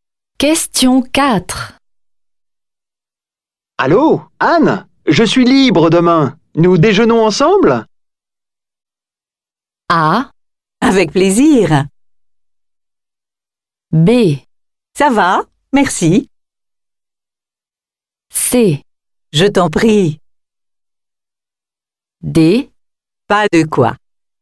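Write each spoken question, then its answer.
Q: Allô, Anne, je suis libre demain. Nous déjeunons ensemble?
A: A: Avec plaisir.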